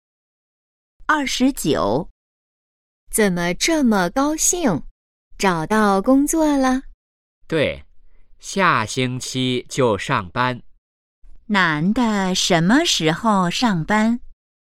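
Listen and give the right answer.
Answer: 下星期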